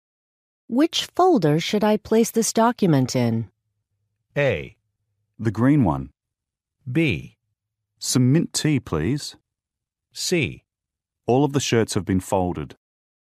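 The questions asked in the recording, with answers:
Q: Which folder should I place this document in?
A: A: The green one.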